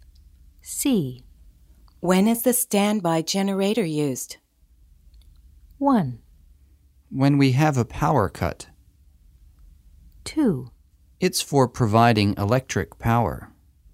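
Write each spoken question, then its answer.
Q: When is the standby generator used?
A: 1: When we have a power cut.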